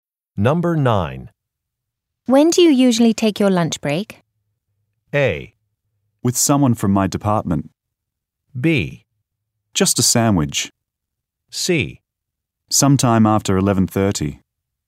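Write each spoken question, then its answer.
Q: When do you usually take your lunch break?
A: C: Sometime after 11:30.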